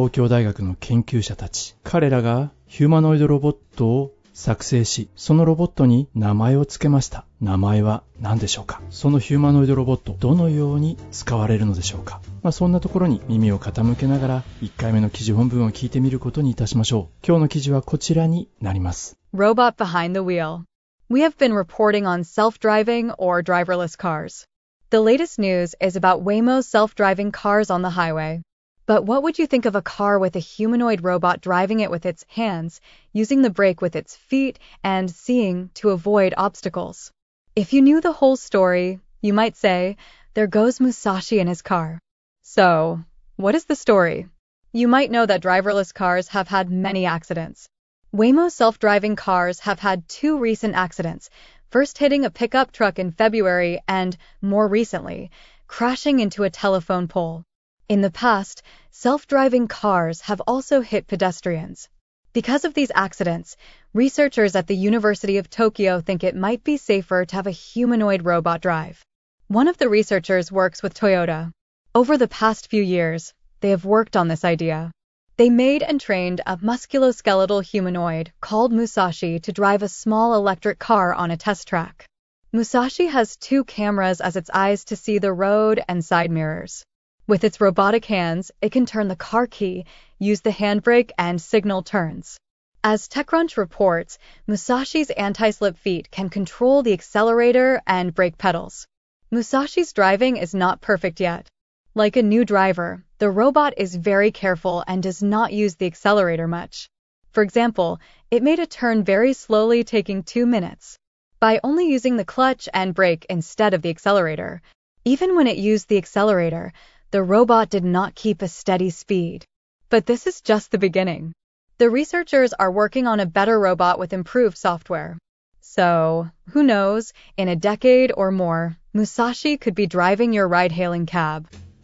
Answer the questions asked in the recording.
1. 名前はムサシなんだね。
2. ムサシというヒューマノイドロボットを彼らは作って、そして小さな電気自動車を運転できるよう、train、訓練したんだね。